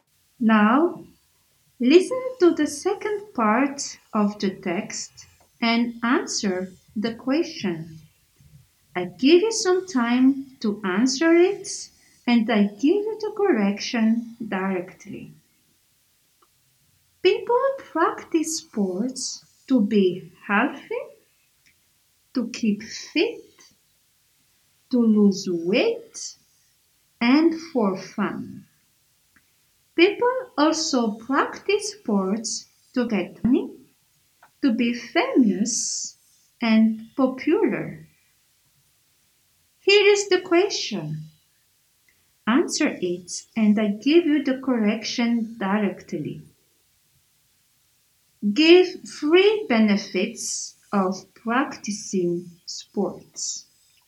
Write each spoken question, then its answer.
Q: Give 3 benefits of practicing sports.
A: We practice sports to be healthy, to keep fit and to lose weight, or we practice sports to get money, to be famous and popular.